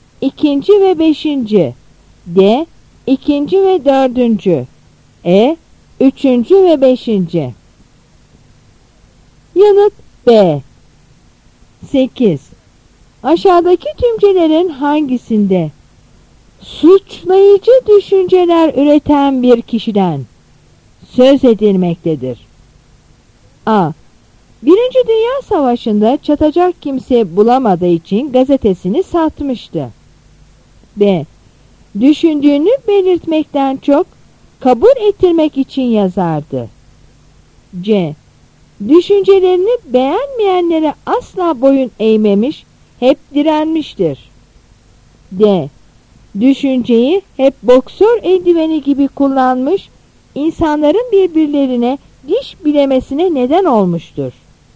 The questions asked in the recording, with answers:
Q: Aşağıdaki tümcelerin hangisinde?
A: Yanıt D.